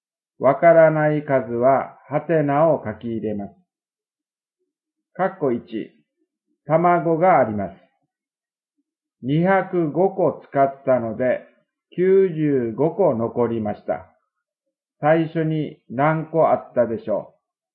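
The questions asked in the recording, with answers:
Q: 最初に何個あったでしょう?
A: 300個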